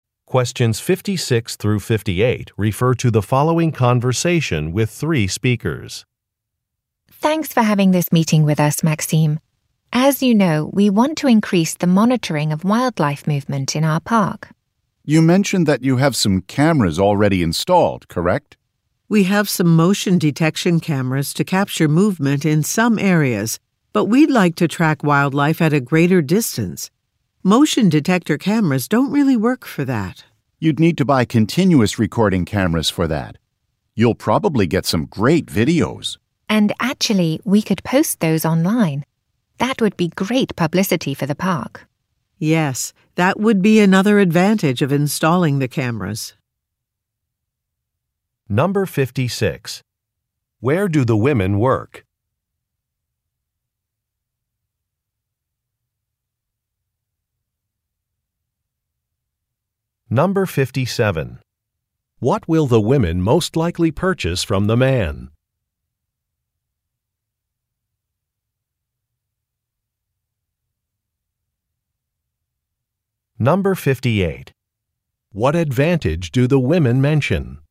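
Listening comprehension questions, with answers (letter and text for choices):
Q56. Where do the women work?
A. At a research laboratory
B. At a wildlife park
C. At a newspaper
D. At an event venue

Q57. What will the women most likely purchase from the man?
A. Outdoor cameras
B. Construction supplies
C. Printing materials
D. Safety equipment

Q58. What advantage do the women mention?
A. Training opportunities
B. Cost savings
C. Increased publicity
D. Efficient staff scheduling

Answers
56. B. At a wildlife park
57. A. Outdoor cameras
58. C. Increased publicity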